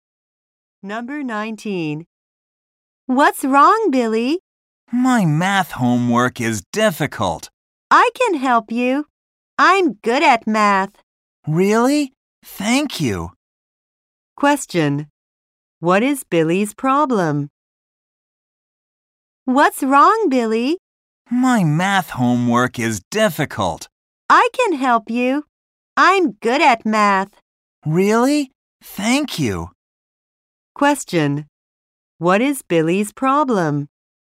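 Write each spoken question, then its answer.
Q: What is Billy's problem?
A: His math homework is difficult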